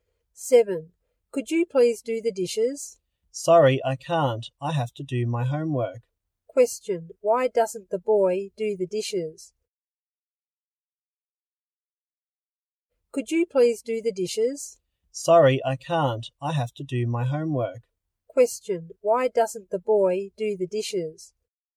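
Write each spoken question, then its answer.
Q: Question, why doesn't the boy do the dishes?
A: He has to do his homework.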